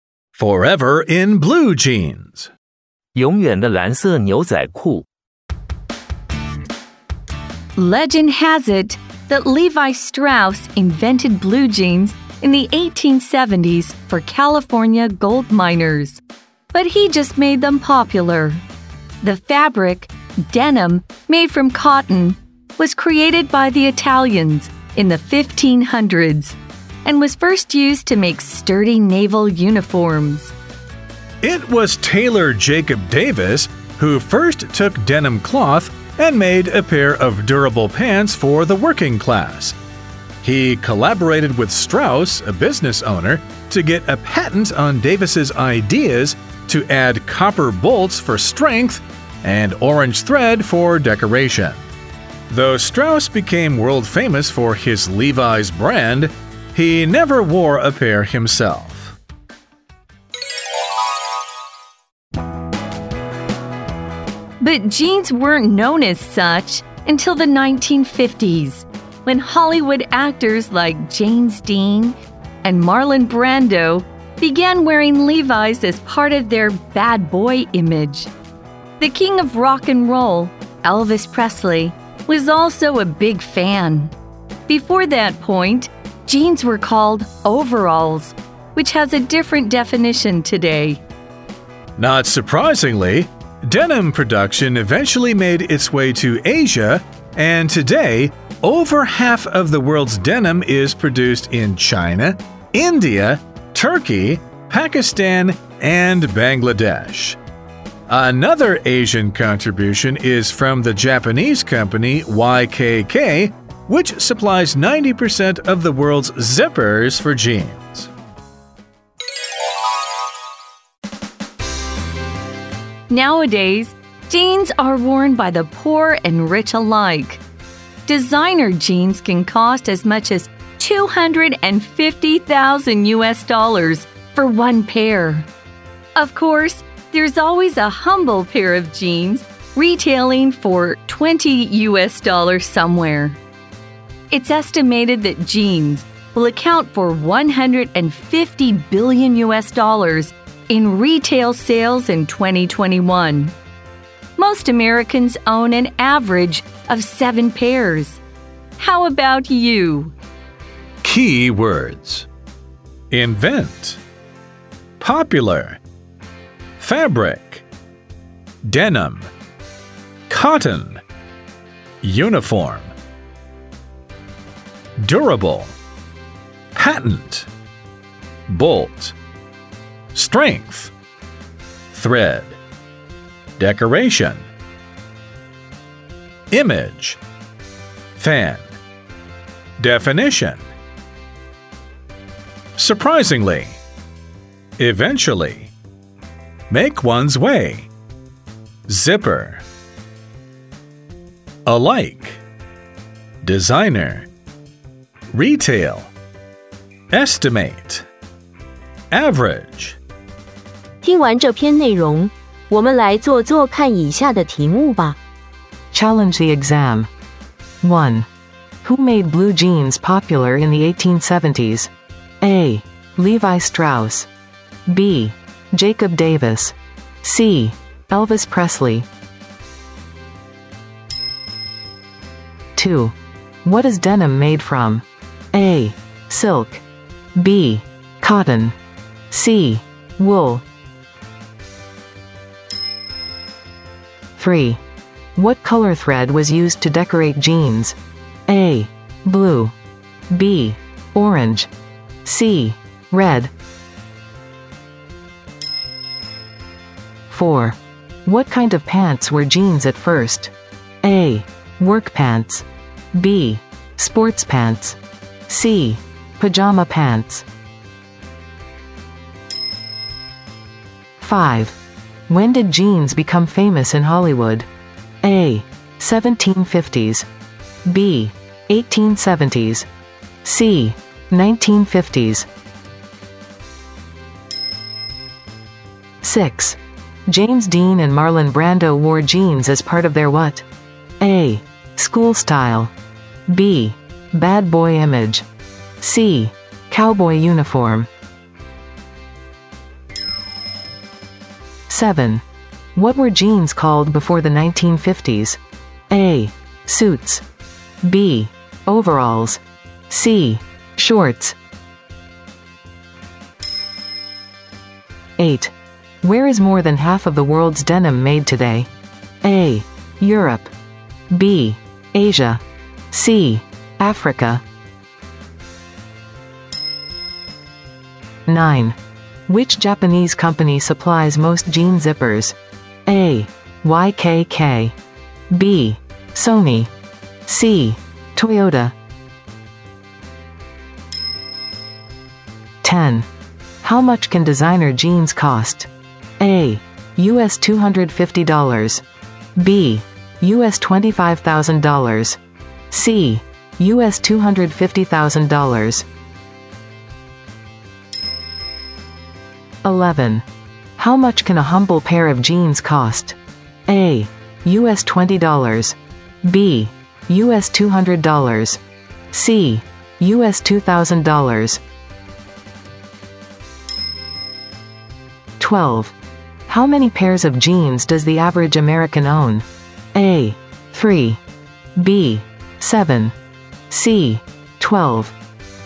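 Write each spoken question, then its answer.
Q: Who made blue jeans popular in the 1870s?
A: A: Levi Strauss

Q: What is denim made from?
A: B: Cotton

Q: What color thread was used to decorate jeans?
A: B: Orange

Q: What kind of pants were jeans at first?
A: A: Work pants

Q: When did jeans become famous in Hollywood?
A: C: 1950s

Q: James Dean and Marlon Brando wore jeans as part of their what?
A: B: Bad boy image

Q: What were jeans called before the 1950s?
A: B: Overalls

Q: Where is more than half of the world's denim made today?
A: B: Asia

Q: Which Japanese company supplies most jean zippers?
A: A: YKK

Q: How much can designer jeans cost?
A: C: US$250,000

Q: How much can a humble pair of jeans cost?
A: A: US$20

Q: How many pairs of jeans does the average American own?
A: B: 7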